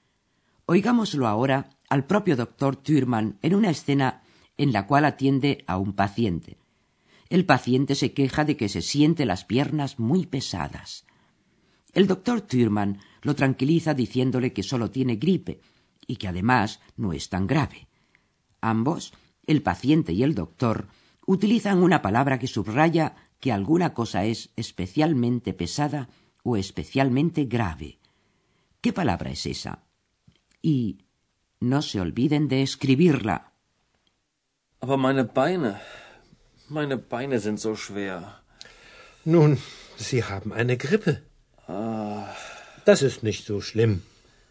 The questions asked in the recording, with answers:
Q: ¿Qué palabra es esa?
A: La última palabra a buscar era la palabra so, que significa tan.